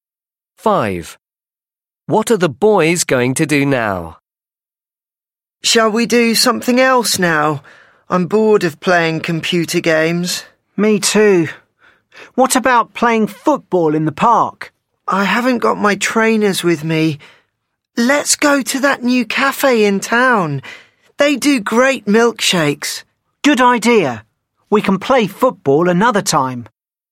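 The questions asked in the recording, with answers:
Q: What are the boys going to do now?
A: go to a new cafe in town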